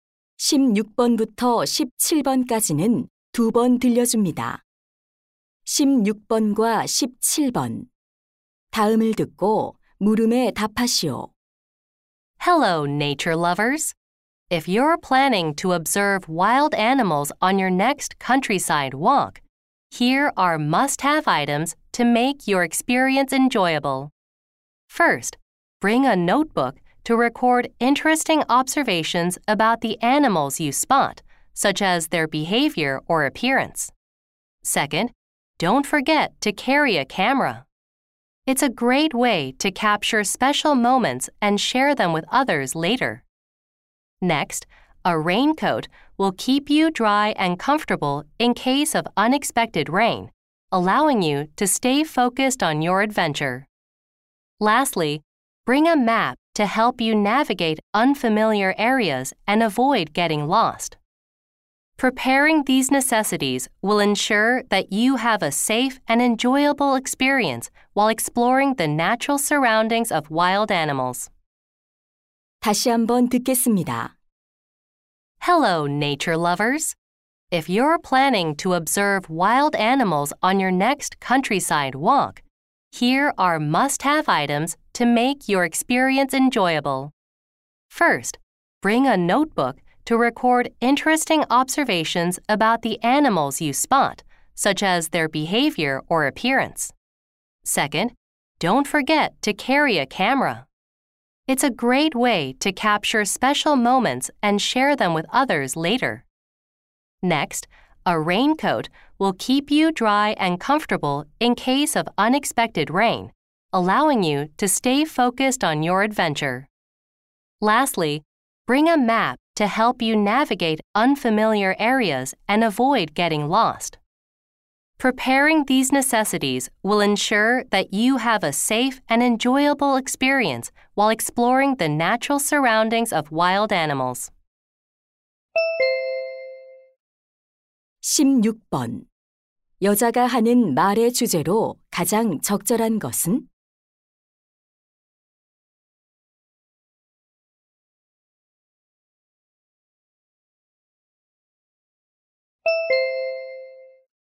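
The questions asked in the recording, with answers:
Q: 여자가 하는 말의 주제로 가장 적절한 것은?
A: 야생 동물 관찰 산책에 필요한 준비물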